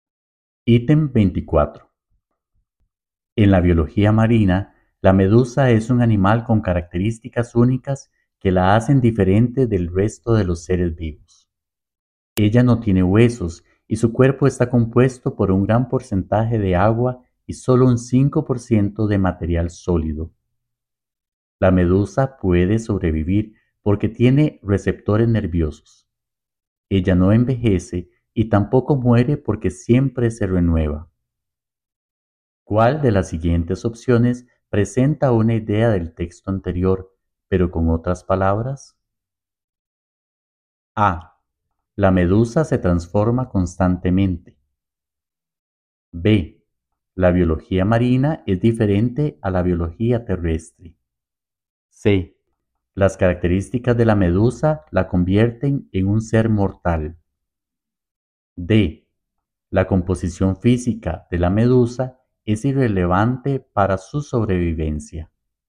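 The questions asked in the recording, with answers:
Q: ¿Cuál de las siguientes opciones presenta una idea del texto anterior, pero con otras palabras?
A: A: La medusa se transforma constantemente.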